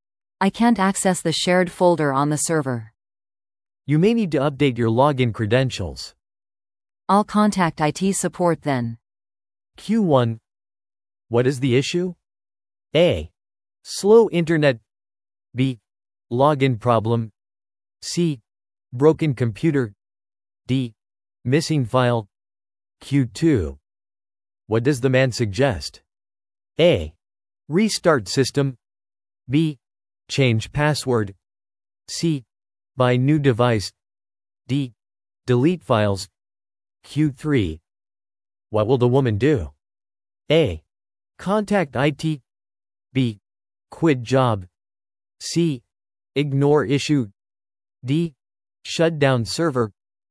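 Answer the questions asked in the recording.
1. B: Login problem.
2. B: Change password.
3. A: Contact IT.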